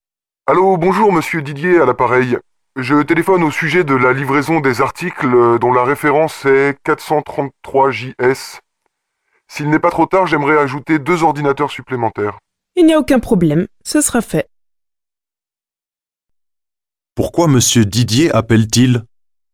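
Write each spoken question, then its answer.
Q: Pourquoi monsieur Didier appelle-t-il?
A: Pour ajouter deux ordinateurs à sa commande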